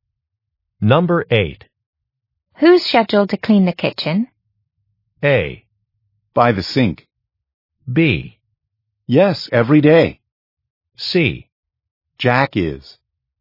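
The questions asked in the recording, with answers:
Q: Who's scheduled to clean the kitchen?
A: C: Jack is.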